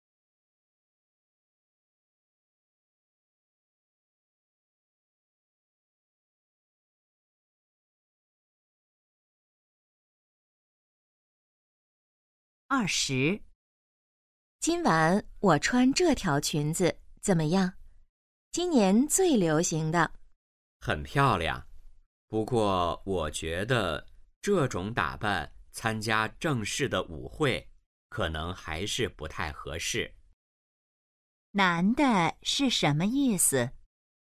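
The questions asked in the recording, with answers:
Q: 男的是什么意思?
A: 这条裙子不适合参加正式舞会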